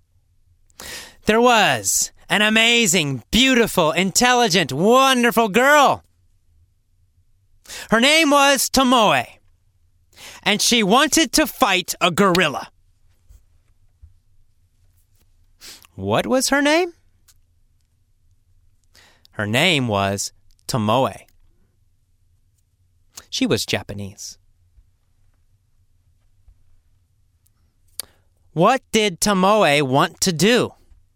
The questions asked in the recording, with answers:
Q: What did Tomoe want to do?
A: Tomoe wanted to fight a gorilla.